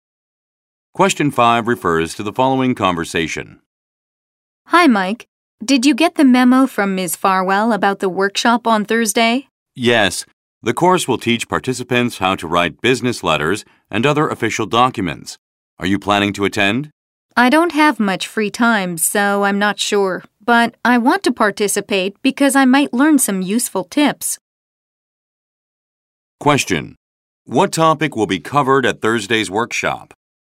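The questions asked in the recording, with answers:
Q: What topic will be covered at Thursday's workshop?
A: How to write business letters and other official documents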